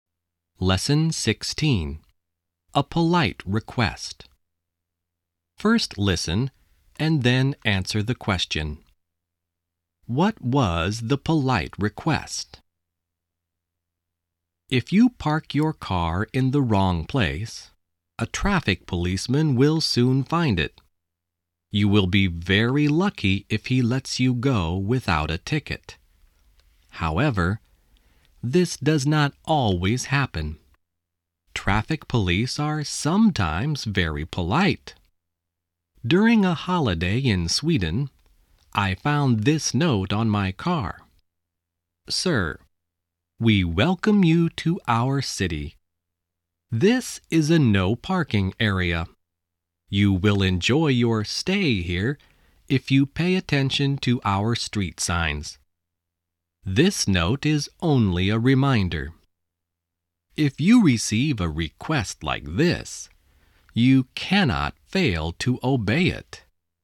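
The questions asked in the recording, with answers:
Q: What was the polite request?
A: To pay attention to the street signs (not to park in a no parking area)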